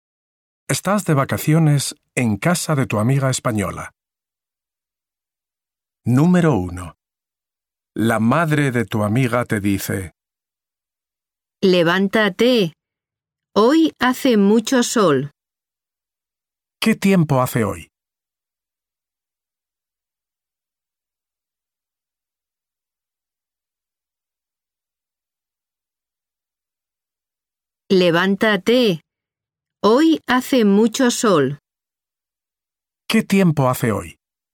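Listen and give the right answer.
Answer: Hace mucho sol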